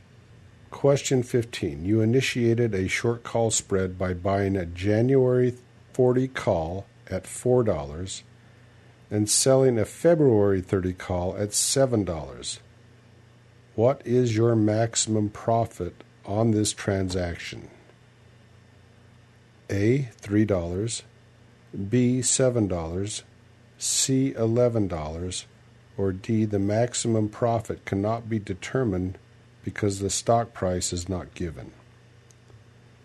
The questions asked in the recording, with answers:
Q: What is your maximum profit on this transaction?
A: And the answer is A. $3.